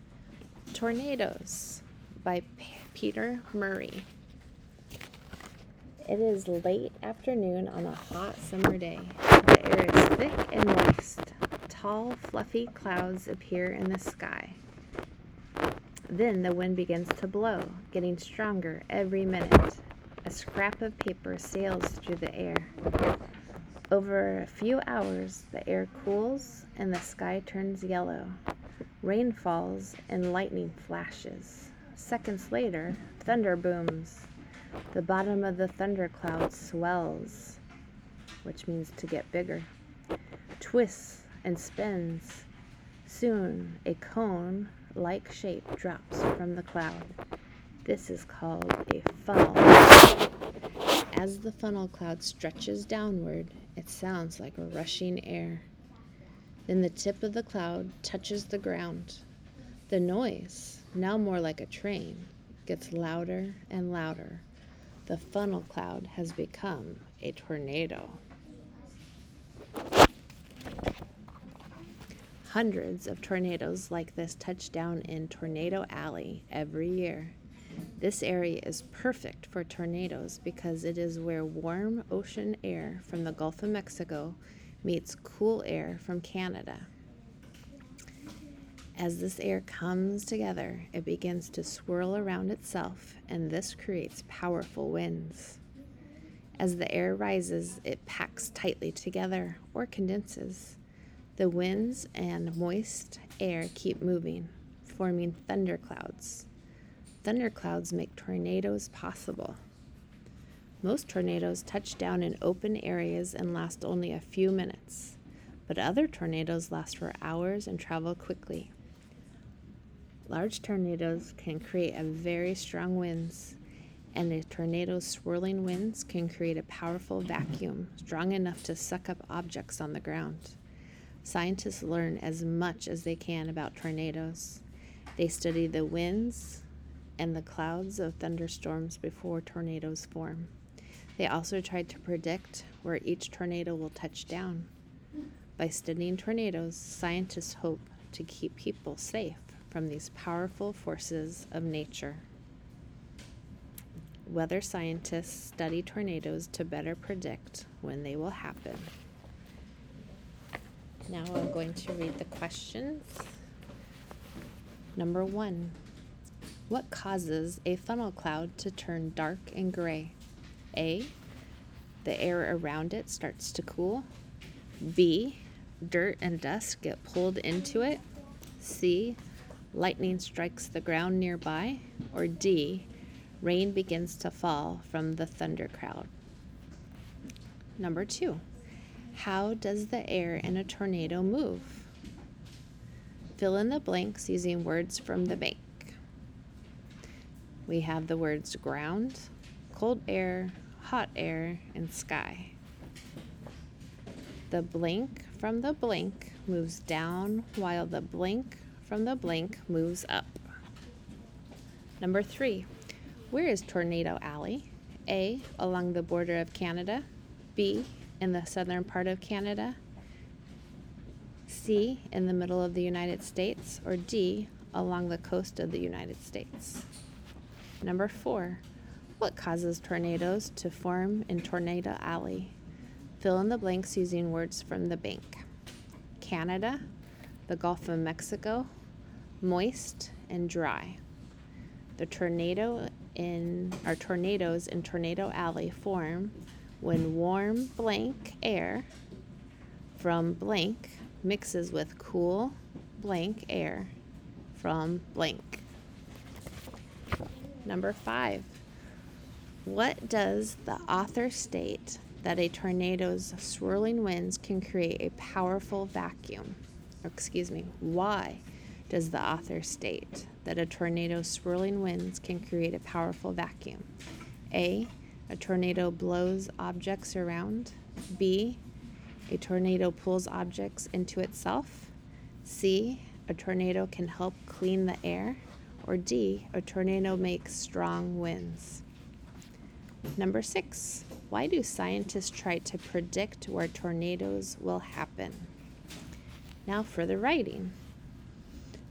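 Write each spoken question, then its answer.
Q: Why does the author state that a tornado's swirling winds can create a powerful vacuum?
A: B: a tornado pulls objects into itself.

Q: why do scientists try to predict where tornadoes will happen?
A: To keep people safe from tornadoes.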